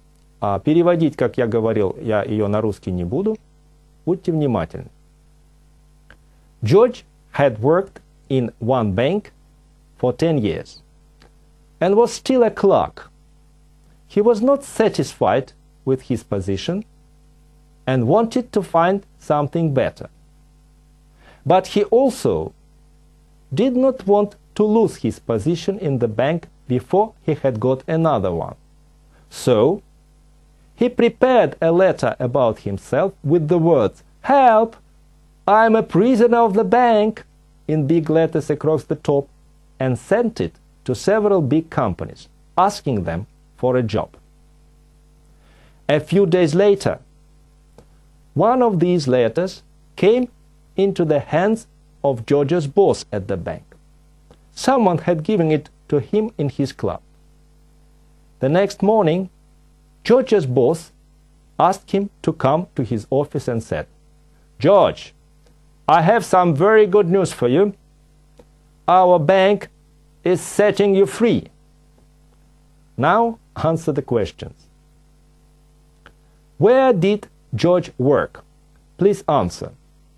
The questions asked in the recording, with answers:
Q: Where did George work?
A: He worked in a bank.